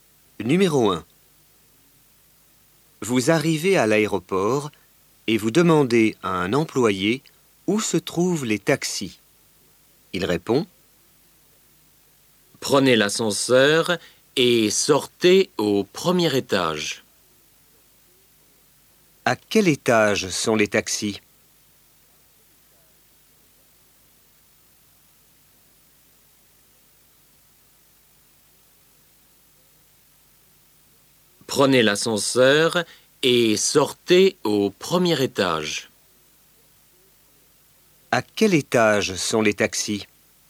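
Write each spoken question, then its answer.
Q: À quel étage sont les taxis?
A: Au premier étage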